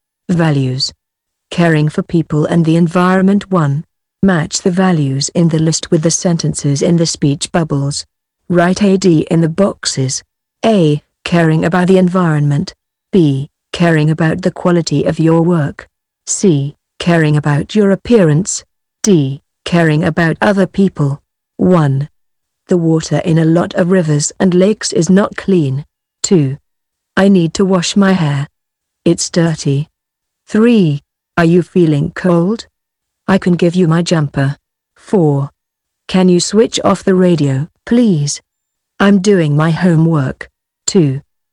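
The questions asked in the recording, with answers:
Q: The water in a lot of rivers and lakes is not clean.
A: A: Caring about the environment.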